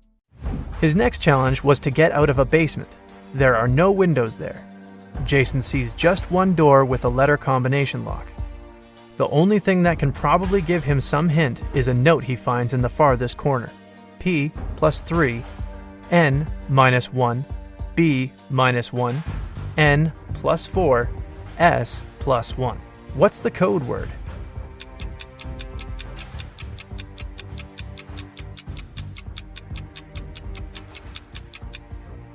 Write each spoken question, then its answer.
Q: What's the code word?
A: The code word was SMART.